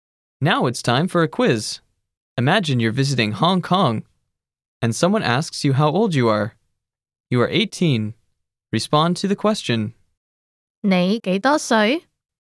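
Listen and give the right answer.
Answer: 我18歲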